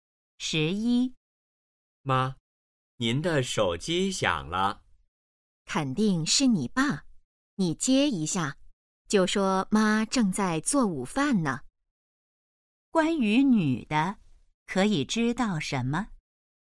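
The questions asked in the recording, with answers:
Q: 关于女的,可以知道什么?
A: 她正在做午饭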